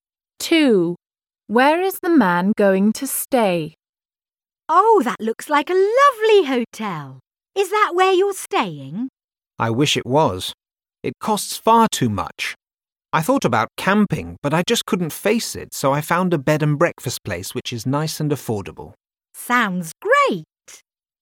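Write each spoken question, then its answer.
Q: Where is the man going to stay?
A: At a bed and breakfast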